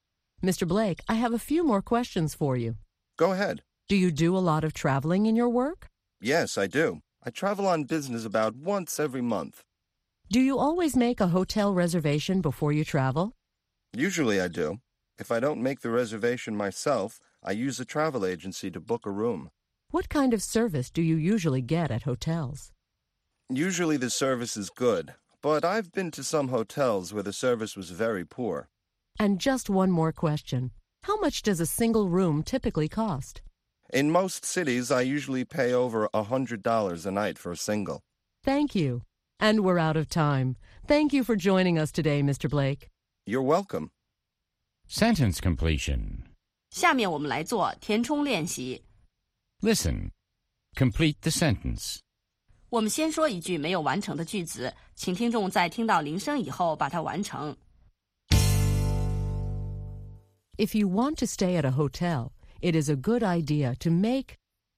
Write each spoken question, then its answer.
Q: If you want to stay at a hotel, it is a good idea to make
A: a reservation. It's a good idea to make a reservation.